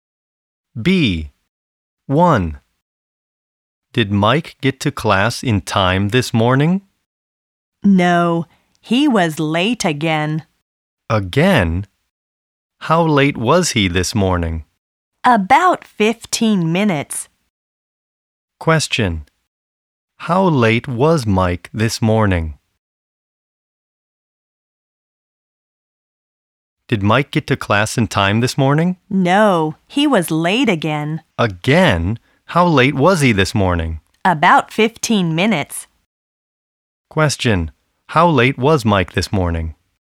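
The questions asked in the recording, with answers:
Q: How late was Mike this morning?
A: About 15 minutes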